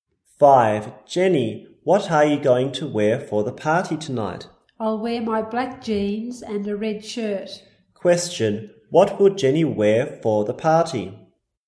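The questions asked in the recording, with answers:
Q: What will Jenny wear for the party?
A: Her black jeans and a red shirt.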